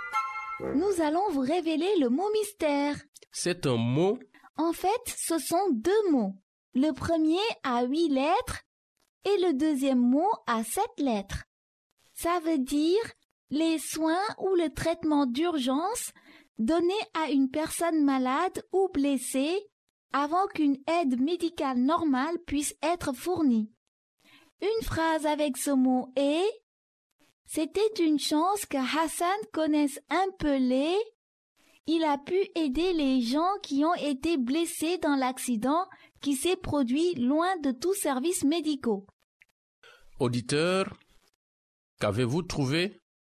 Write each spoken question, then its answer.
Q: Auditeur, qu'avez-vous trouvé?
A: Le mot mystère d'aujourd'hui est premier secours.